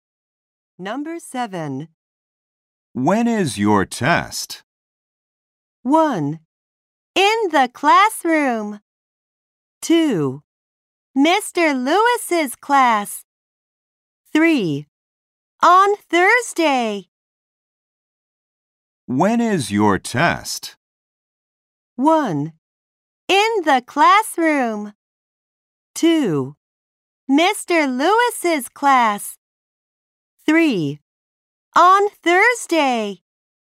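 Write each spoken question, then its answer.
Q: When is your test?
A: 3: On Thursday.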